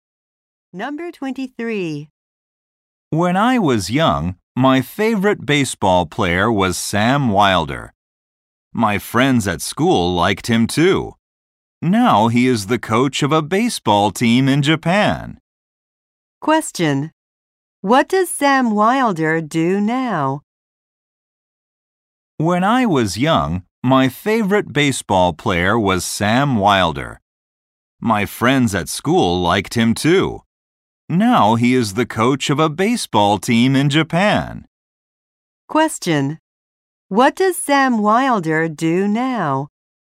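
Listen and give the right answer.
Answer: He coaches a baseball team in Japan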